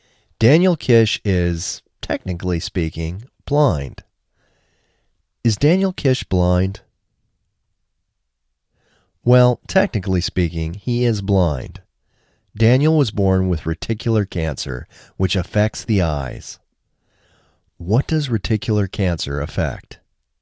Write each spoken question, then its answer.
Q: What does reticular cancer affect?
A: Reticular cancer affects the eyes.